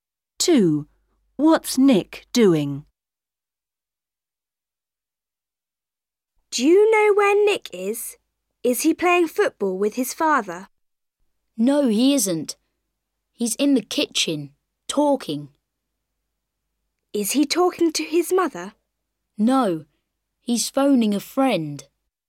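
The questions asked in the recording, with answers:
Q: What's Nick doing?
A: phoning a friend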